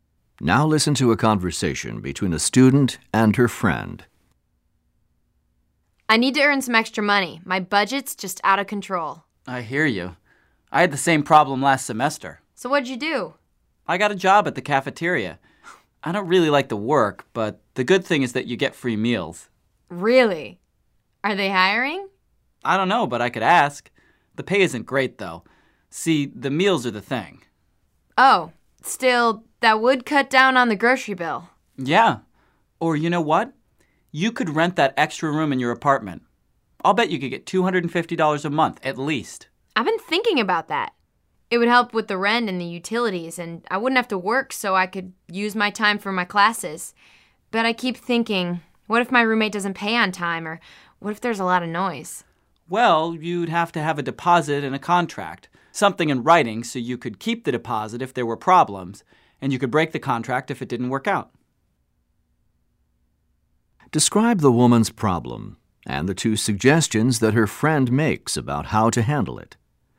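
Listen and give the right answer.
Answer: She needs extra money because her budget is out of control. Her friend suggests getting a job at the cafeteria, which comes with free meals, or renting out the extra room in her apartment, with a deposit and a contract.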